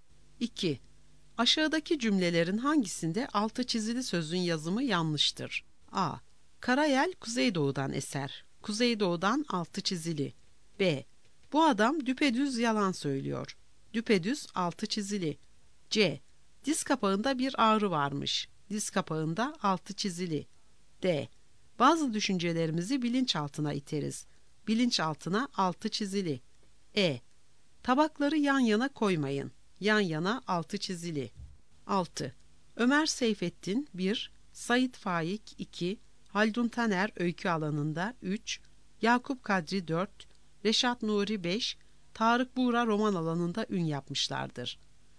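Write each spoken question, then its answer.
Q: Aşağıdaki cümlelerin hangisinde altı çizili sözün yazımı yanlıştır?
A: C: Diz kapağında bir ağrı varmış.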